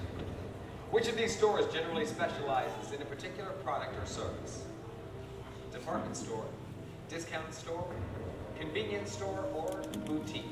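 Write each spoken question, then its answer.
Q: Which of these stores generally specializes in a particular product or service?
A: D: boutique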